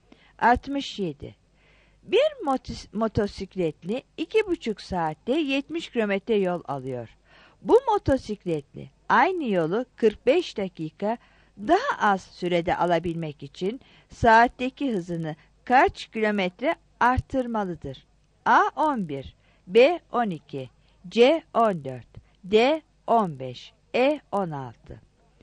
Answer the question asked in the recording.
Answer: 67 B